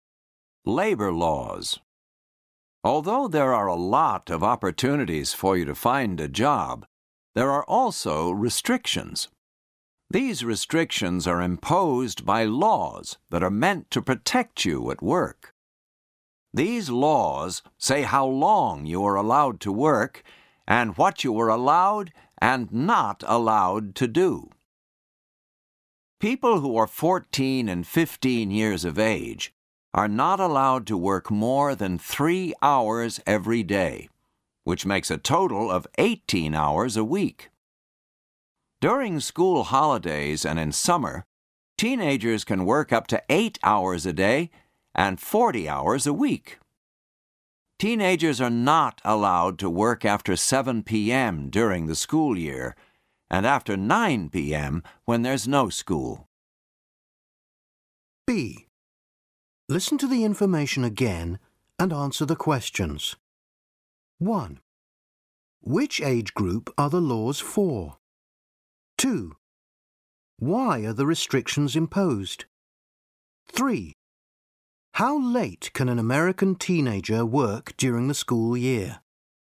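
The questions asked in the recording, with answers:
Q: Which age group are the laws for?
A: People who are 14 and 15 years old

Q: Why are the restrictions imposed?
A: To protect teenagers at work

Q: How late can an American teenager work during the school year?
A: Until 7 p.m.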